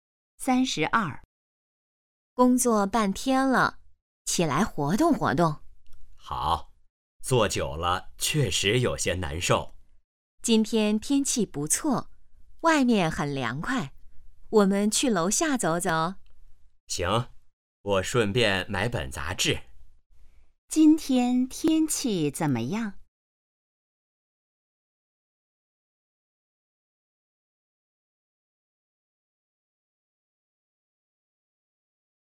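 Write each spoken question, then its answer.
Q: 今天天气怎么样?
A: 不错,很凉快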